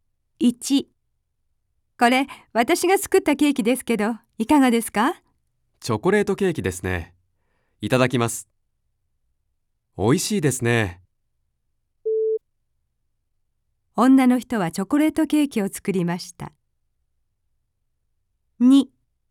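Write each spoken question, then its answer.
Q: 女の人はチョコレートケーキを作りました。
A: ○(正しい)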